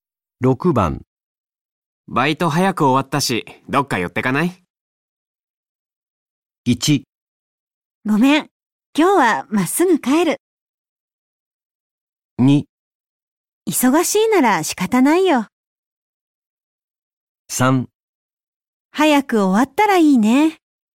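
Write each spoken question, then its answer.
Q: バイト早く終わったし、どっか寄ってかない?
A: 1: ごめん、今日はまっすぐ帰る。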